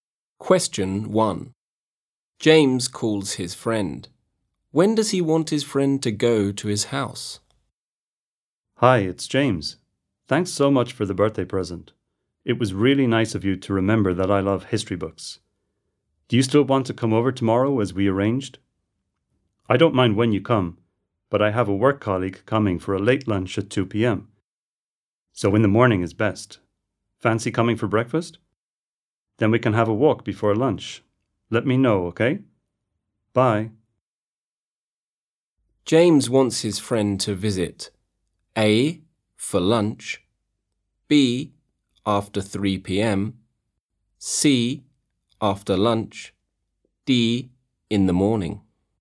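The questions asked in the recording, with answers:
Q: When does he want his friend to go to his house?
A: D: In the morning.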